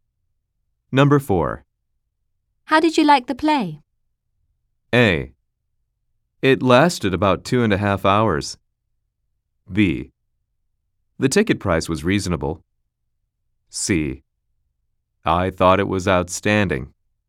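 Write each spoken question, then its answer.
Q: How did you like the play?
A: C: I thought it was outstanding.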